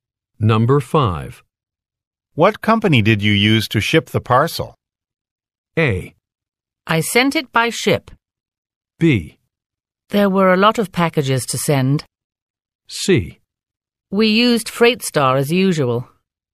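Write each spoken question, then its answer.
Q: What company did you use to ship the parcel?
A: C: We used FreightStar as usual.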